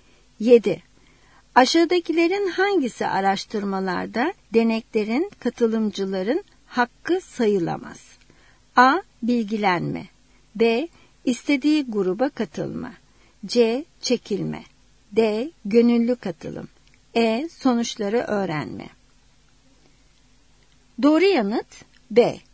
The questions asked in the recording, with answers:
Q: Aşağıdakilerin hangisi araştırmalarda deneklerin, katılımcıların hakkı sayılamaz?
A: Doğru yanıt B.